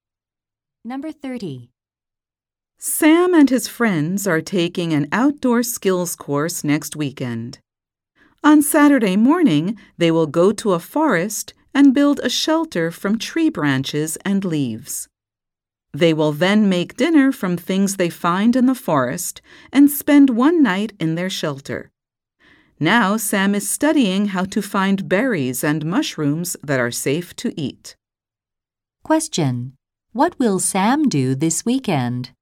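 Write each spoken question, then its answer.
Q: What will Sam do this weekend?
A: Take an outdoor skills course and sleep in a shelter in the forest.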